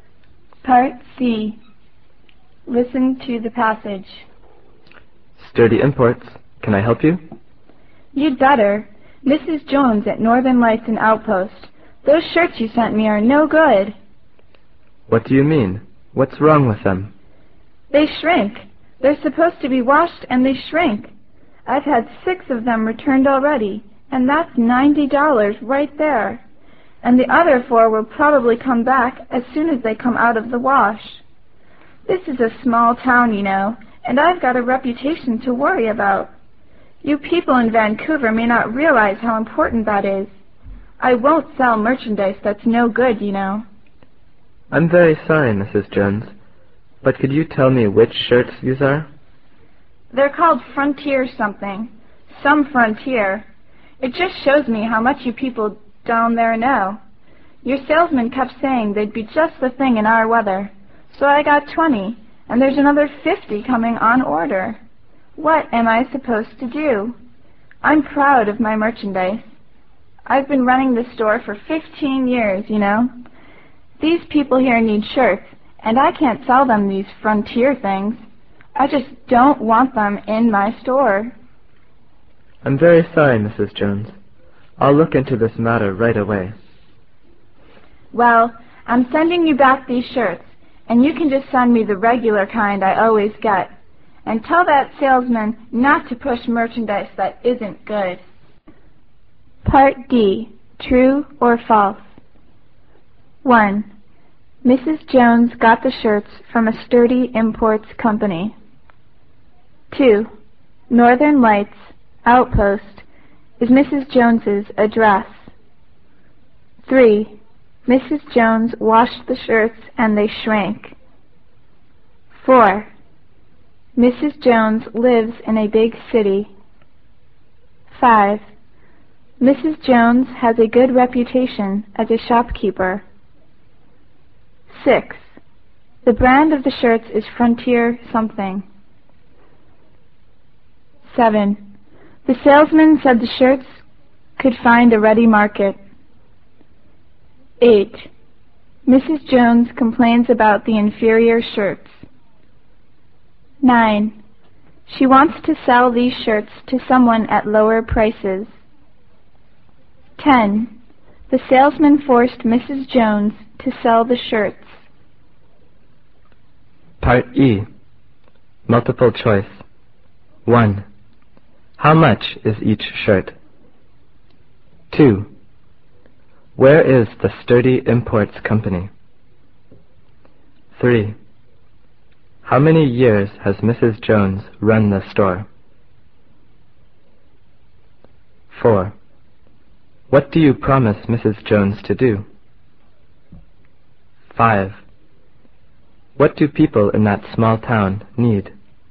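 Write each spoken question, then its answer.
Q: Mrs. Jones got the shirts from a Sturdy Imports company.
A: True

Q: Mrs. Jones lives in a big city.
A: False

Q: The brand of the shirts is Frontier something.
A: True

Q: Mrs. Jones complains about the inferior shirts.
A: True

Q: She wants to sell these shirts to someone at lower prices.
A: False

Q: The salesman forced Mrs. Jones to sell the shirts.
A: False

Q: How much is each shirt?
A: $15

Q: Where is the Sturdy Imports company?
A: In Vancouver

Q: How many years has Mrs. Jones run the store?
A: 15 years

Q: What do you promise Mrs. Jones to do?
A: To look into the matter right away

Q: What do people in that small town need?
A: Shirts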